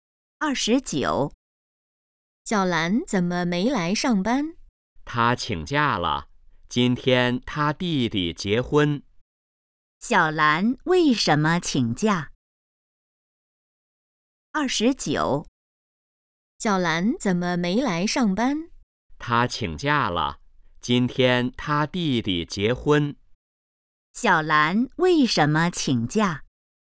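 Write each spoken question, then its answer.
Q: 小兰为什么请假?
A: 弟弟结婚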